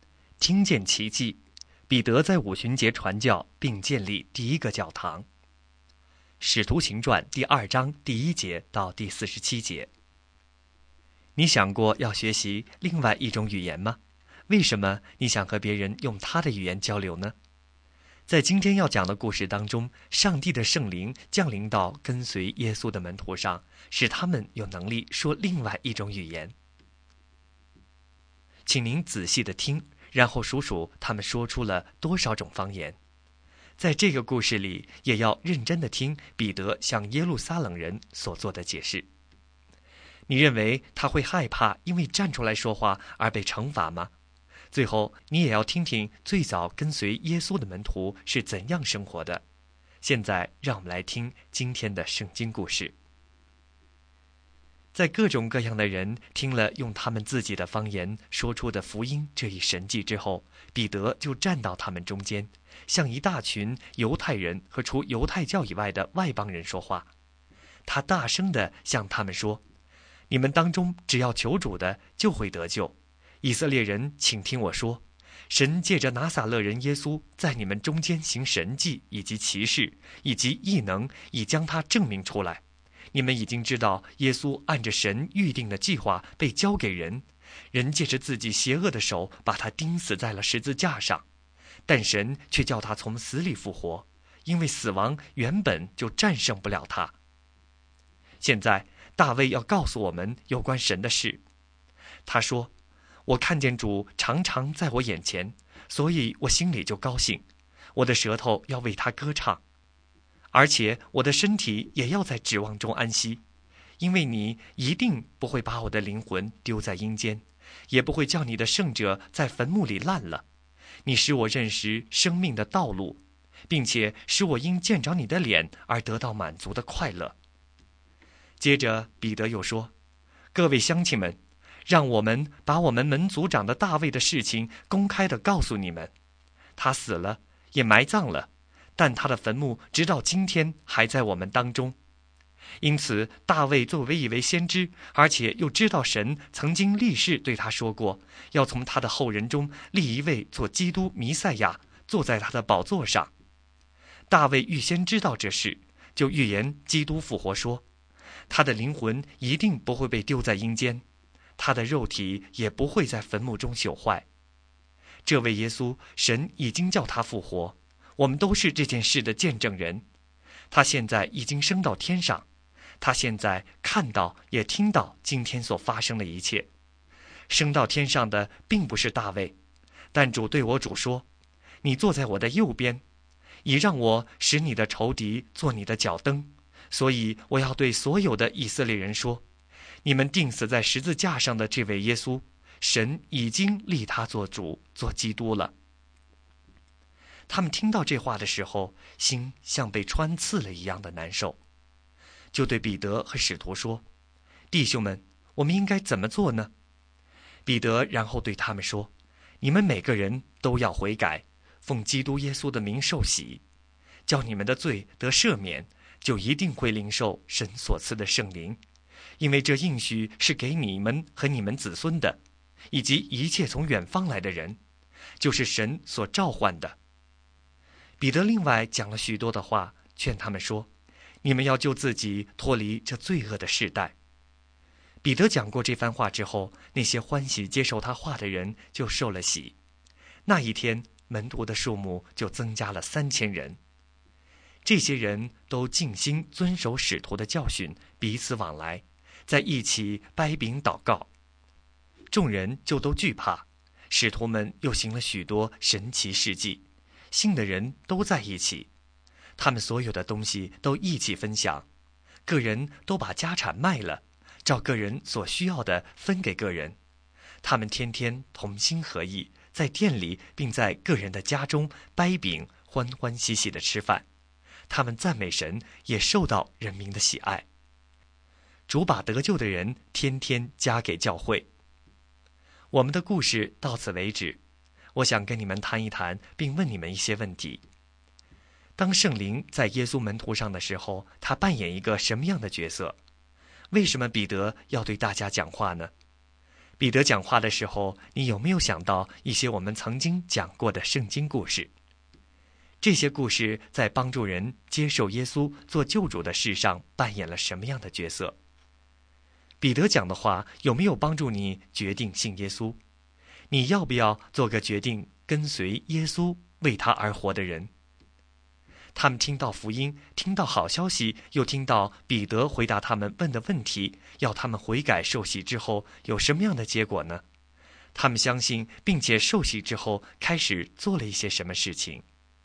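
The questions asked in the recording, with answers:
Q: 他们听到福音,听到好消息,又听到彼得回答他们问的问题,要他们悔改受洗之后有什么样的结果呢?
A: 接受他话的人受了洗,那一天门徒增加了3000人

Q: 他们相信并且受洗之后开始做了一些什么事情?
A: 遵守使徒的教训,彼此往来,一起掰饼祷告,分享所有东西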